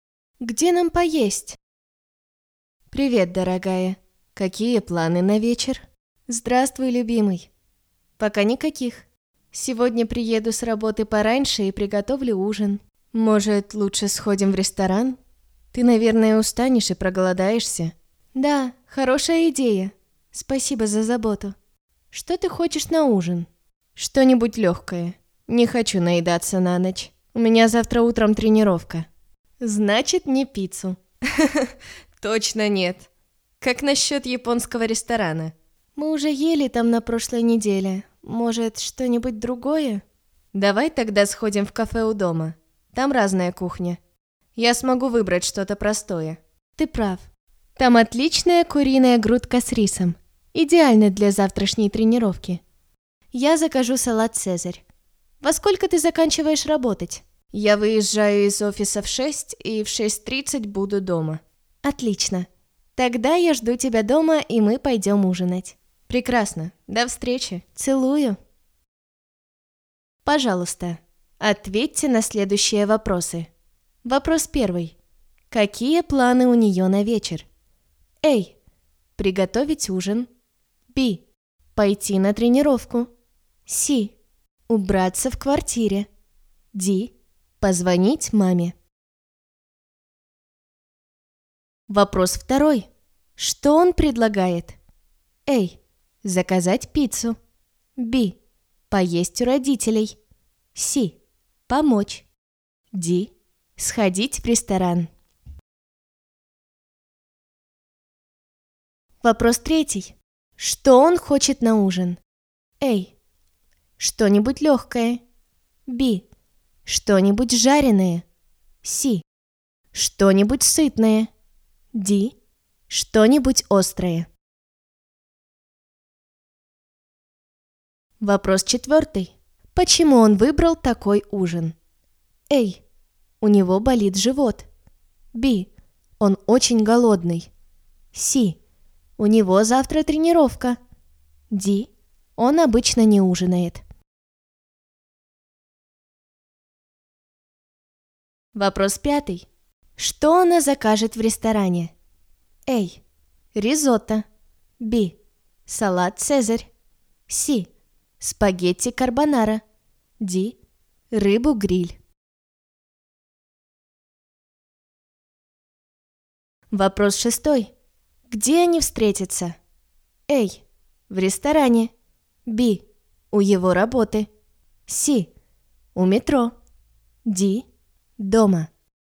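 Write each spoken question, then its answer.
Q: Какие планы у нее на вечер?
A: A: Приготовить ужин.

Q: Что он предлагает?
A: Д: Сходить в ресторан.

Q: Что он хочет на ужин?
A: А: Что-нибудь легкое.

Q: Почему он выбрал такой ужин?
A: С: У него завтра тренировка.

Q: Что она закажет в ресторане?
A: Б: Салат «Цезарь».

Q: Где они встретятся?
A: Д: Дома.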